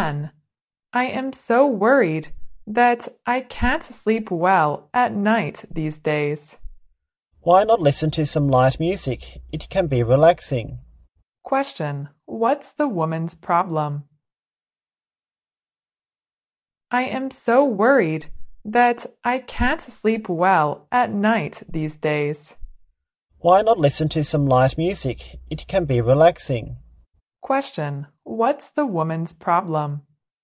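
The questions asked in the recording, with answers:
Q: What's the woman's problem?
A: She can't sleep well at night because she is worried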